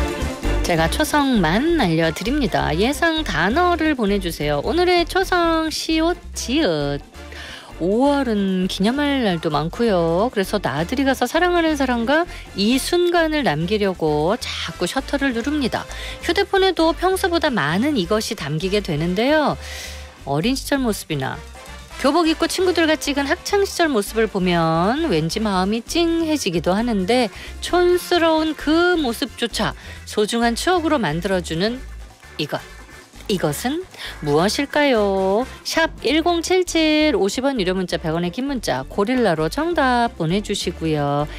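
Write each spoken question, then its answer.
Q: 이것은 무엇일까요?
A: 사진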